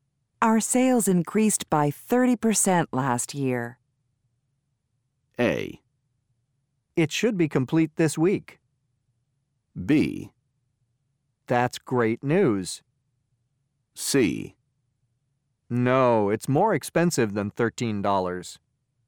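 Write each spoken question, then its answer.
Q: Our sales increased by 30% last year.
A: B: That's great news.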